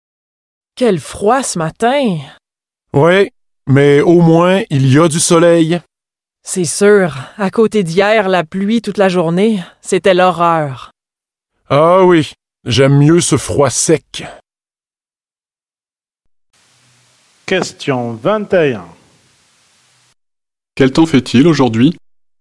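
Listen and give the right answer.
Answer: Froid et ensoleillé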